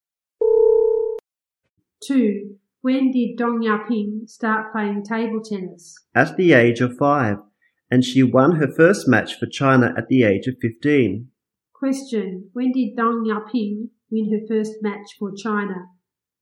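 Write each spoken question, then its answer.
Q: When did Dong Yaping win her first match for China?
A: At the age of 15.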